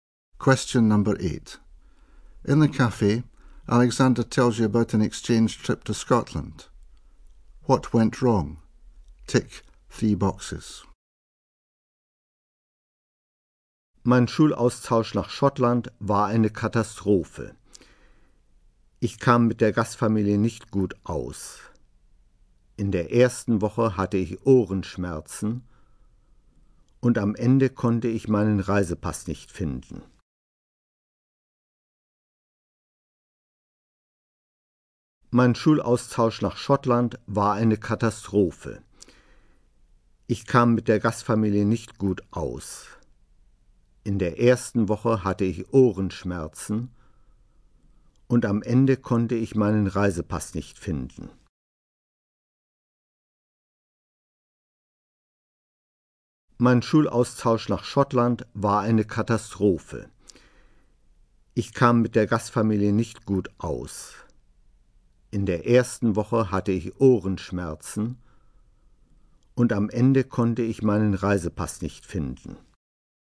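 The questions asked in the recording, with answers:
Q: What went wrong?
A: He didn't get on with the host family, had earache, couldn't find his passport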